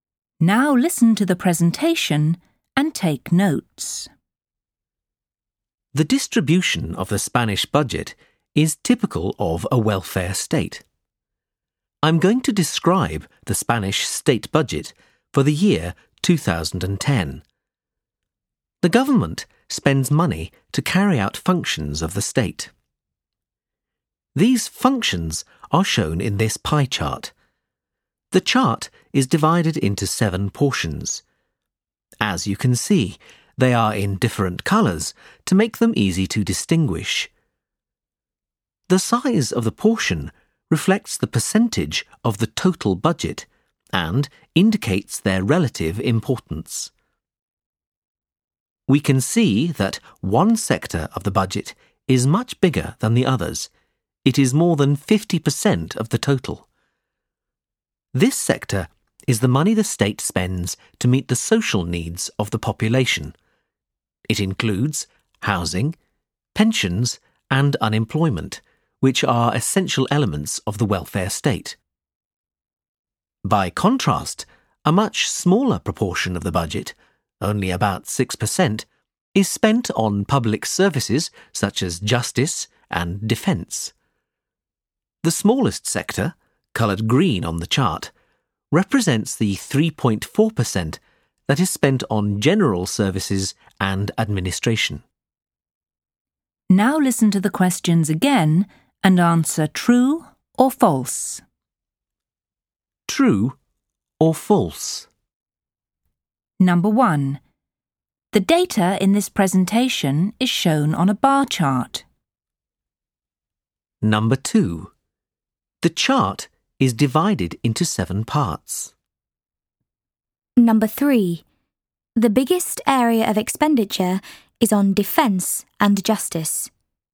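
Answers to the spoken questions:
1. False
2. True
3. False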